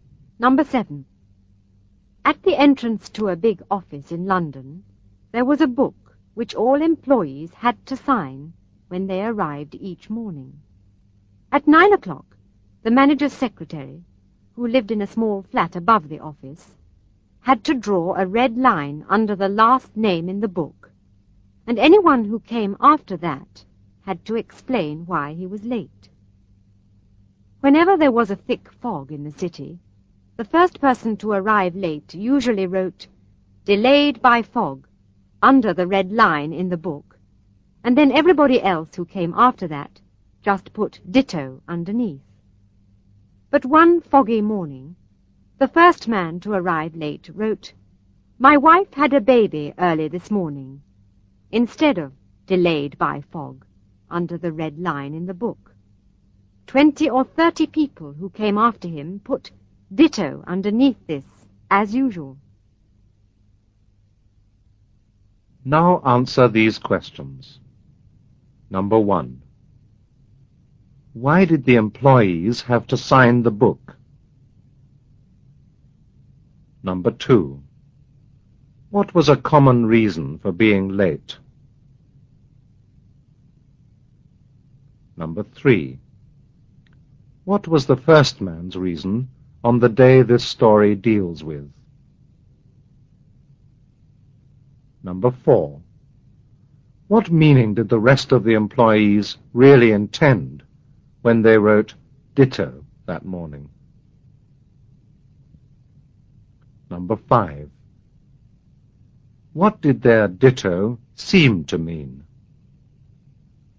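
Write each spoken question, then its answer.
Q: Why did the employees have to sign the book?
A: To show what time they arrived each morning

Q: What was a common reason for being late?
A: Thick fog

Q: What was the first man's reason on the day this story deals with?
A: His wife had a baby early that morning

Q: What meaning did the rest of the employees really intend when they wrote "ditto" that morning?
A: That they were delayed by fog

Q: What did their "ditto" seem to mean?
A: That their wives had also had babies that morning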